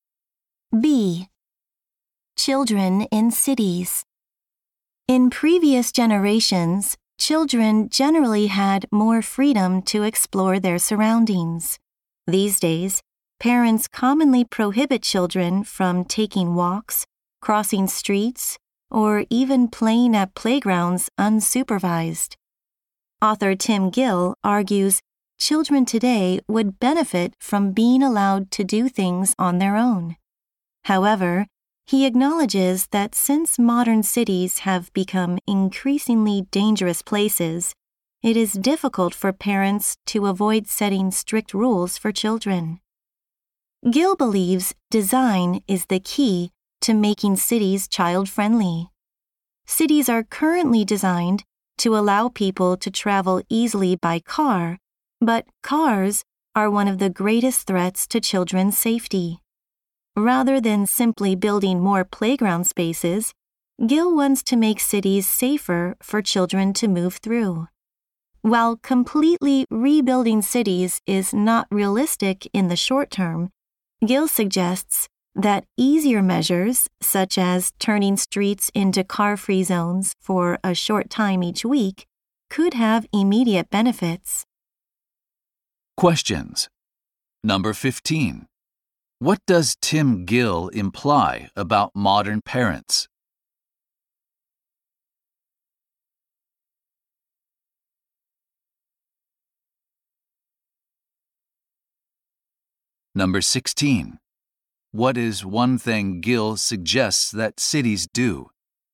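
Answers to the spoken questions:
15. It is hard for them to avoid setting strict rules because cities are dangerous.
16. Make streets car-free for a short time each week.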